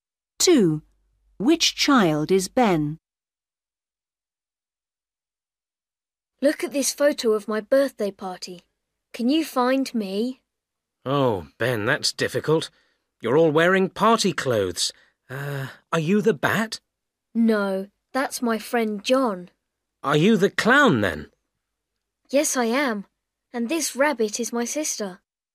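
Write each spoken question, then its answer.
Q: Which child is Ben?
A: The clown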